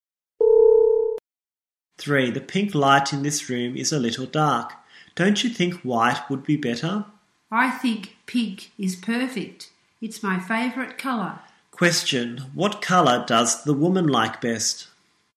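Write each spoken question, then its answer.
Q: Question, what colour does the woman like best?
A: Pink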